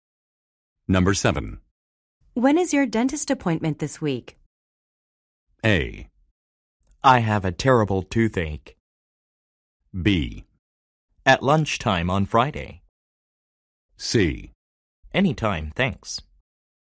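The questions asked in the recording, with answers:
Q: When is your dentist appointment this week?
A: B: At lunchtime on Friday.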